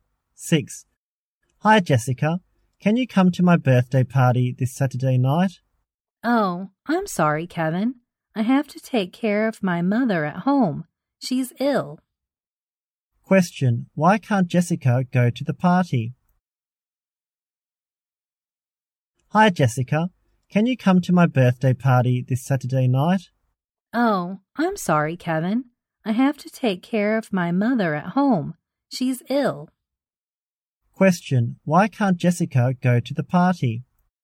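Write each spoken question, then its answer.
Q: Question, why can't Jessica go to the party?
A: She has to take care of her sick mother at home.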